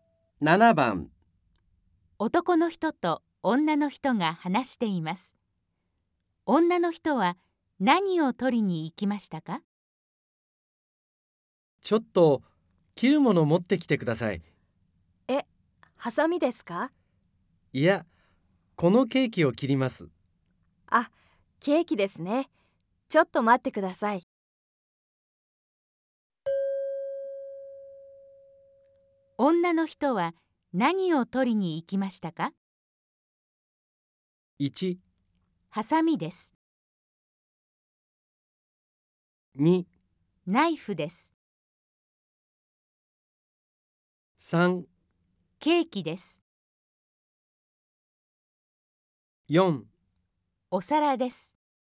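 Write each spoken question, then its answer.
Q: 女の人は何を取りに行きましたか?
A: 2: ナイフです。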